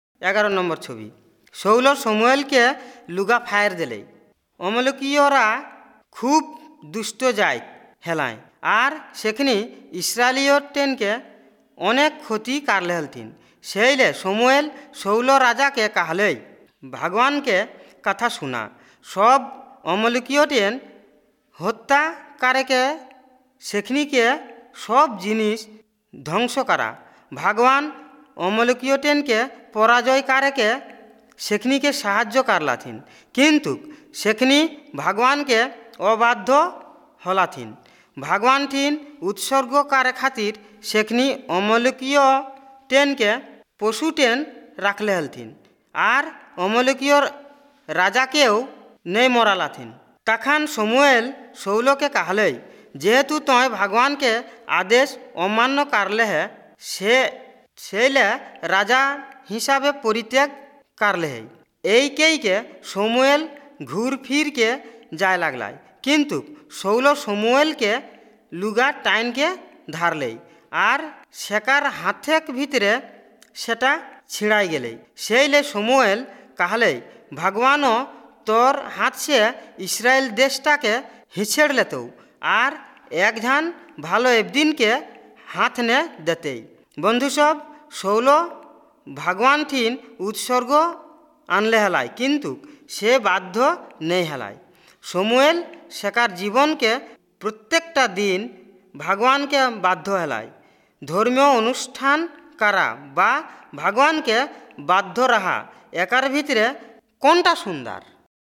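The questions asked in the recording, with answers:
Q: ধর্মীয় অনুষ্ঠান করা বা ভগবানকে বাধ্য রাহা, একার ভিতরে কোনটা সুন্দর?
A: ভগবানকে বাধ্য রাহা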